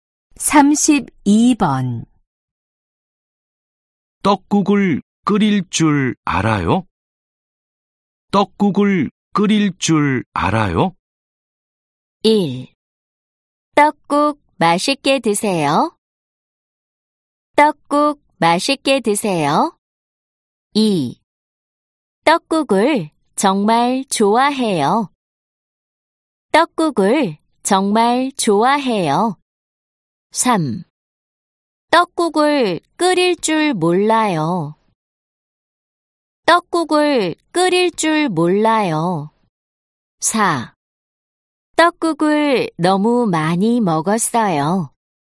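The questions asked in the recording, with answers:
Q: 떡국을 끓일 줄 알아요?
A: 3: 떡국을 끓일 줄 몰라요.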